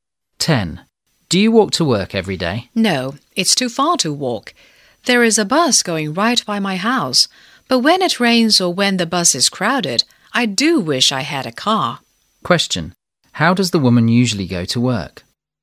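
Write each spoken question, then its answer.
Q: How does the woman usually go to work?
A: By bus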